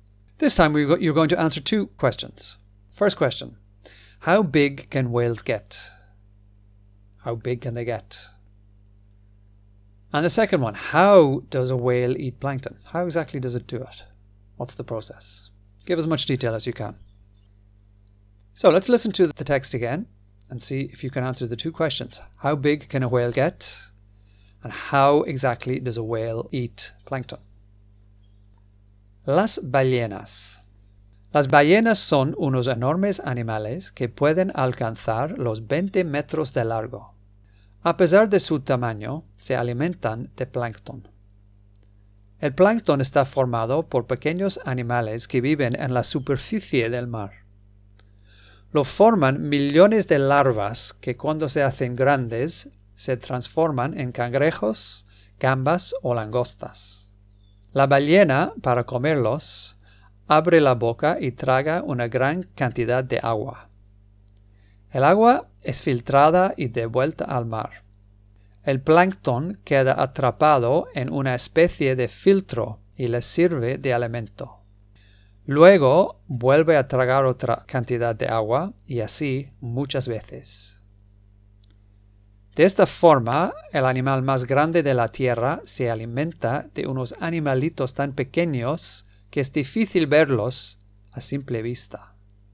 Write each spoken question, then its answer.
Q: How big can whales get?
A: 20 metros de largo, 20 meters long.

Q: How does a whale eat plankton?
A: La ballena abre la boca y traga una gran cantidad de agua.